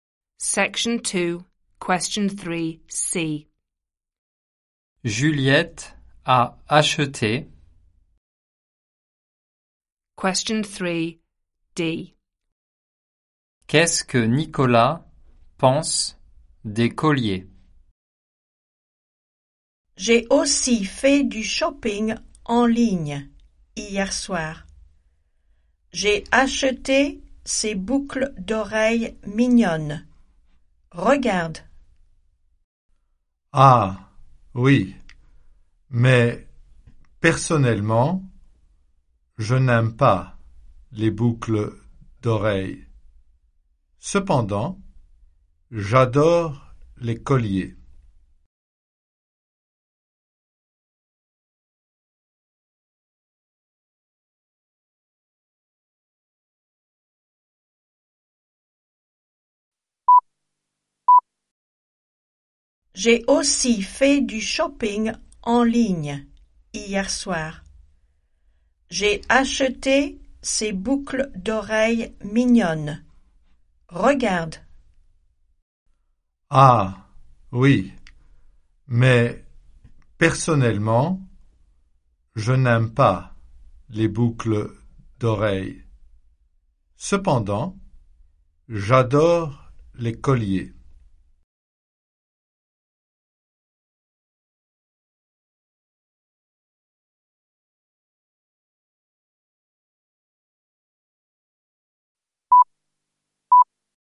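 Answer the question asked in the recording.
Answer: Il les adore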